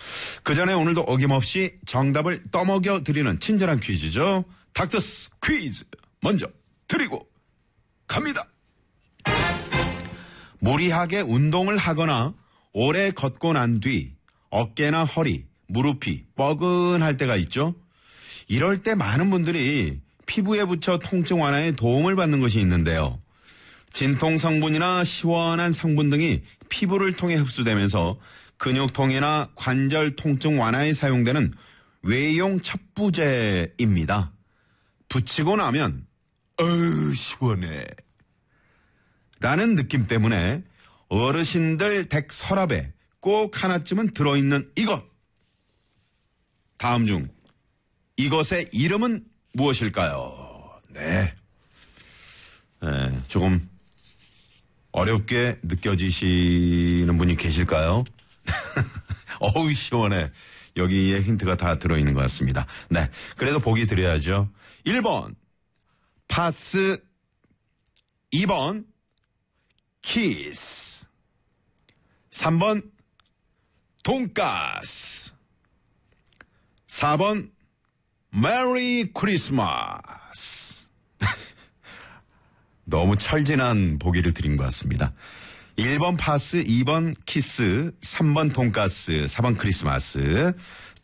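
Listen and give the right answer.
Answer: 1: 파스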